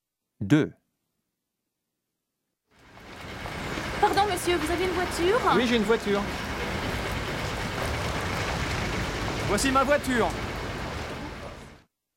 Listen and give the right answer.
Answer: 2, oui.